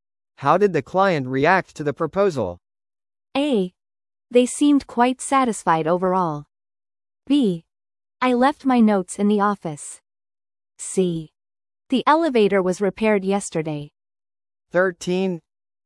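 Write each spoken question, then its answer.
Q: How did the client react to the proposal?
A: A: They seemed quite satisfied overall.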